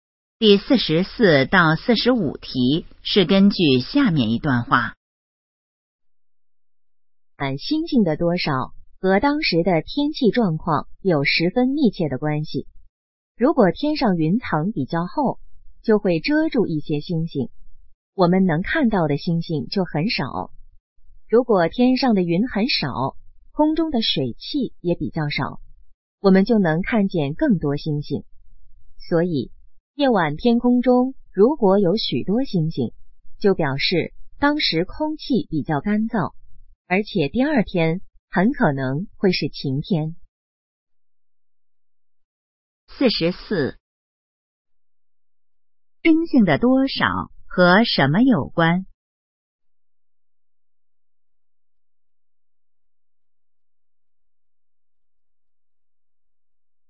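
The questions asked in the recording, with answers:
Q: 冰性的多少和什么有关?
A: 天气状况

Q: 如果晚上星星多,能说明什么?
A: 空气比较干燥,第二天很可能是晴天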